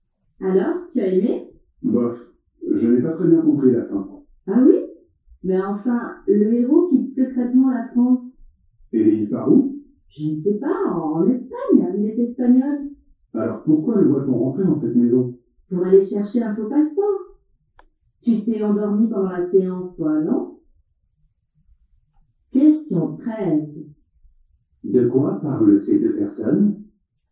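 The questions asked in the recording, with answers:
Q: De quoi parlent ces deux personnes?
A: D'un film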